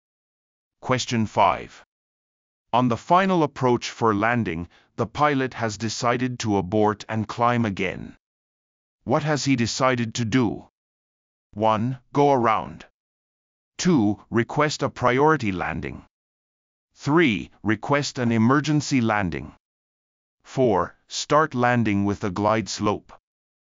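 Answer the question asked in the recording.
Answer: 1: Go around.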